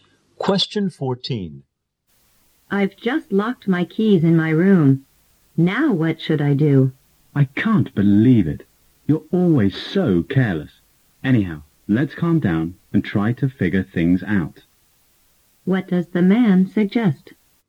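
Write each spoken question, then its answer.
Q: What does the man suggest?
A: Calm down and figure out what to do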